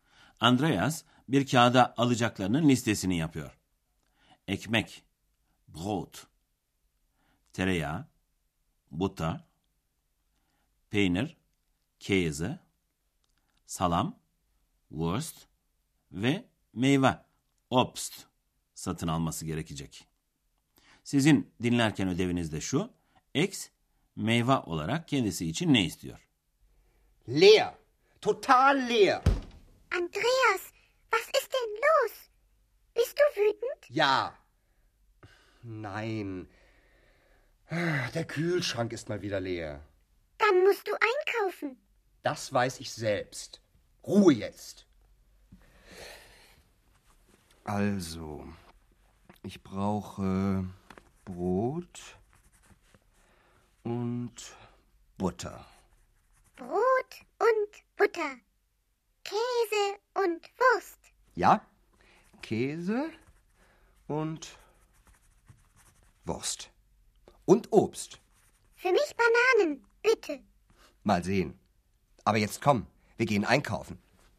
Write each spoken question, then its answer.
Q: X meyve olarak kendisi için ne istiyor?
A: Evet, X kendisi için muz istiyordu.